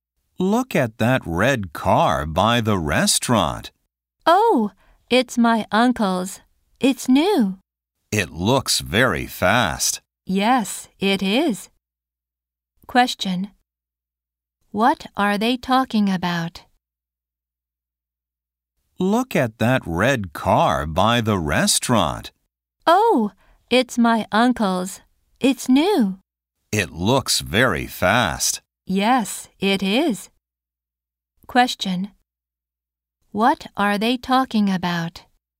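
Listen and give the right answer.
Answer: The uncle's new red car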